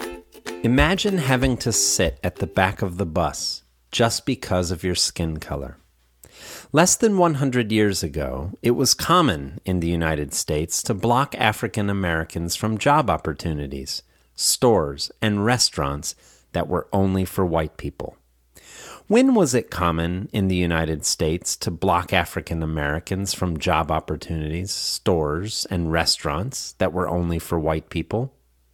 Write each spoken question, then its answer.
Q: When was it common in the United States to block African Americans from job opportunities, stores, and restaurants that were only for white people?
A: Less than 100 years ago, it was common in the United States to block African Americans from job opportunities, stores, and restaurants that were only for white people.